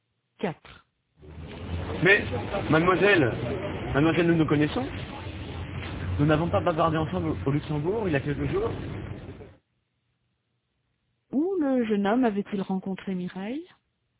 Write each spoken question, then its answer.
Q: Où le jeune homme avait-il rencontré Mireille?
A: Au Luxembourg.